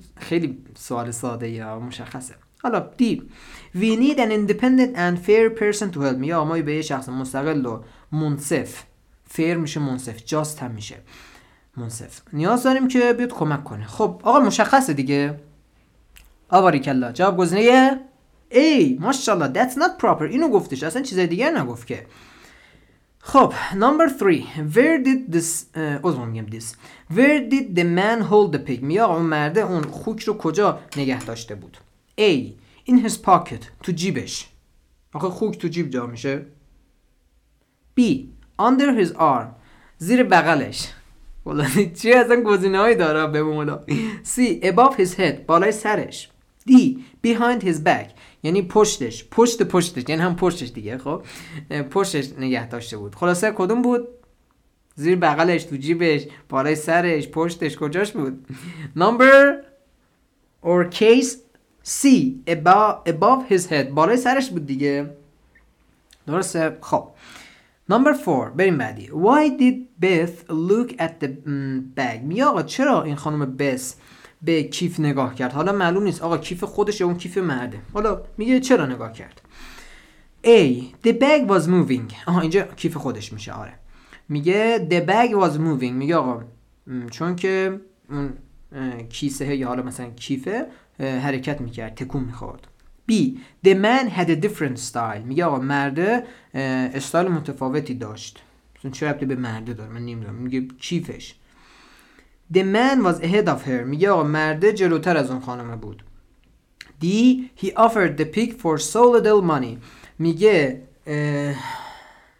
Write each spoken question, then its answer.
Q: Why did Beth look at the bag؟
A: جواب میشه گزینه A The bag was moving